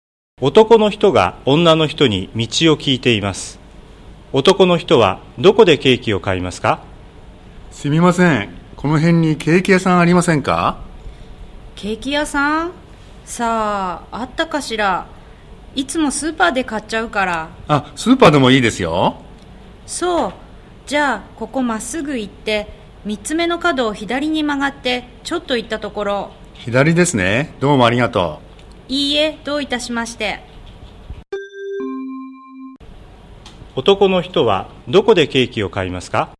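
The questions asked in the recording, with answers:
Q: 男の人はどこでケーキを買いますか?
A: スーパー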